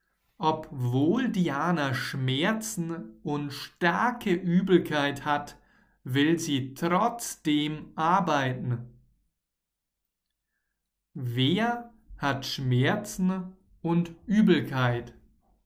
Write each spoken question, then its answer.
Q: Wer hat Schmerzen und Übelkeit?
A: Diana. Diana hat Schmerzen und starke Übelkeit.